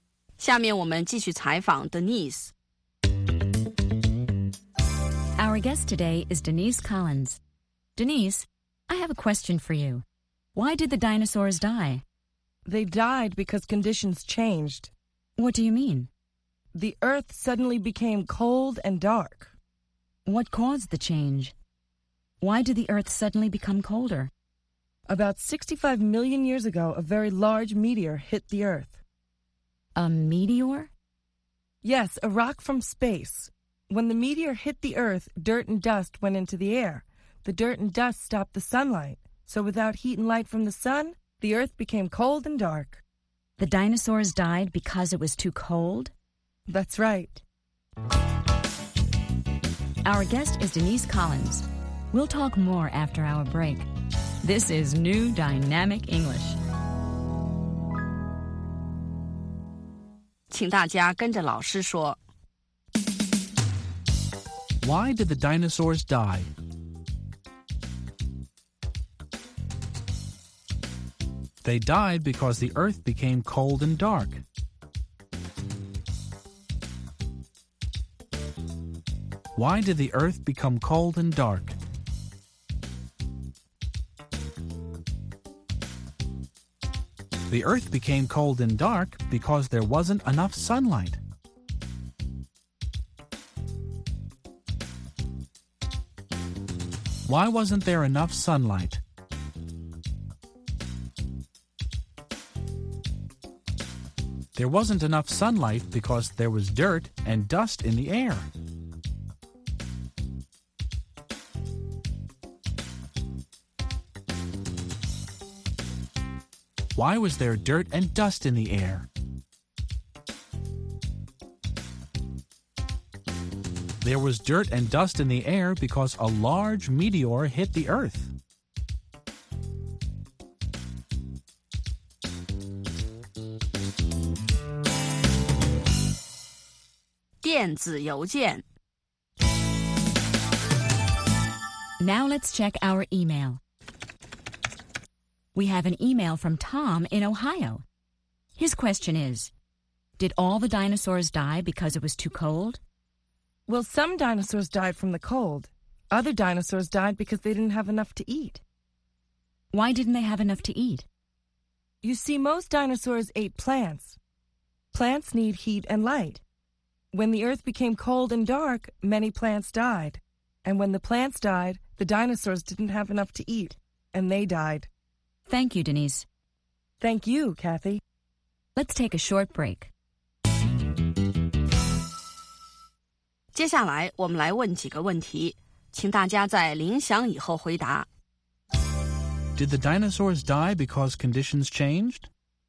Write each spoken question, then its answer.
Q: Did the dinosaurs die because conditions changed?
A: Yes, they did. They died because conditions changed.